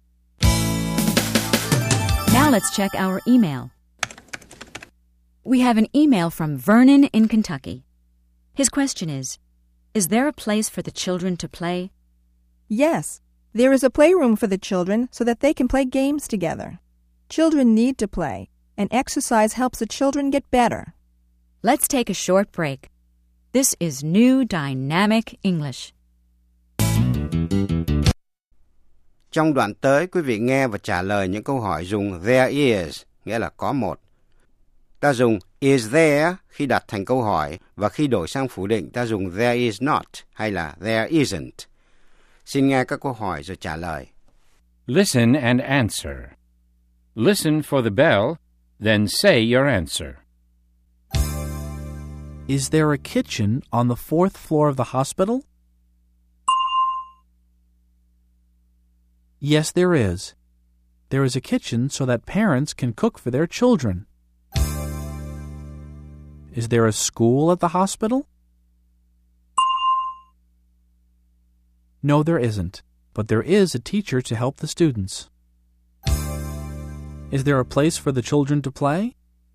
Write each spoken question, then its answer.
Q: Is there a place for the children to play?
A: Yes, there is. There's a playroom.